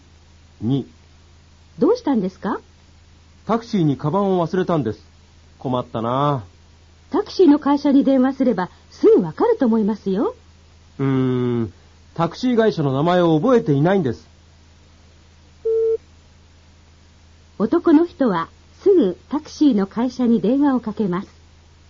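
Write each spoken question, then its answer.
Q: 男の人はすぐタクシーの会社に電話をかけます。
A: 正しくない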